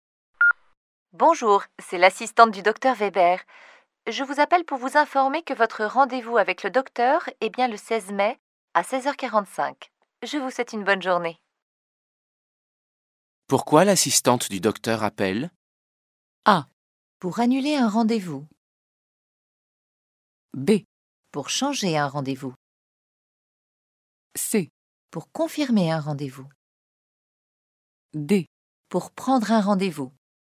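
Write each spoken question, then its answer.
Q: Pourquoi l'assistante du docteur appelle?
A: C: Pour confirmer un rendez-vous.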